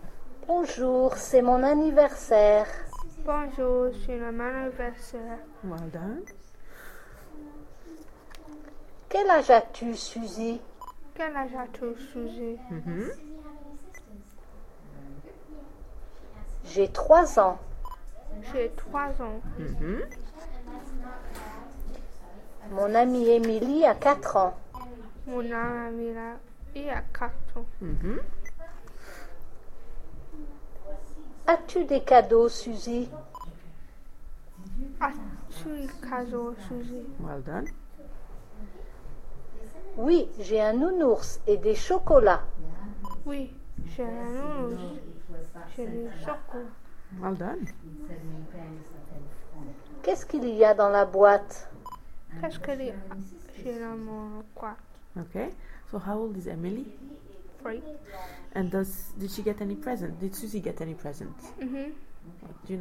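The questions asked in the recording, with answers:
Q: Did Susie get any present?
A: Yes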